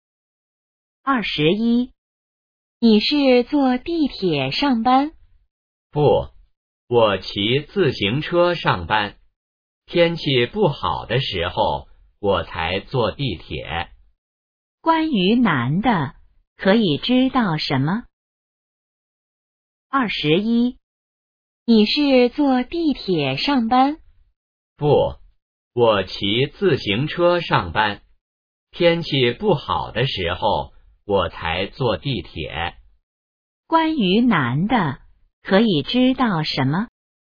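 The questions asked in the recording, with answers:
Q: 关于男的,可以知道什么?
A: 他一般骑自行车上班,天气不好时才坐地铁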